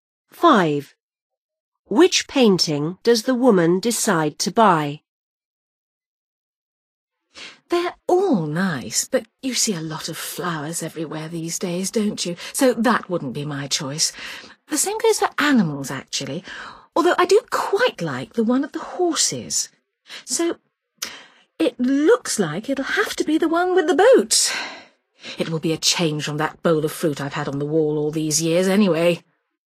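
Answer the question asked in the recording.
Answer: the one with the boats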